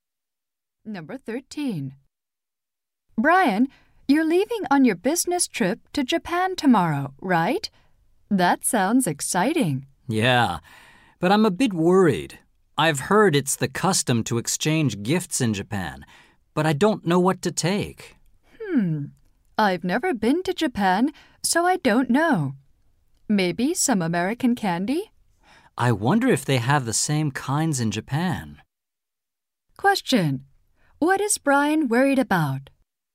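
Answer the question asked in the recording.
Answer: What gift to take to Japan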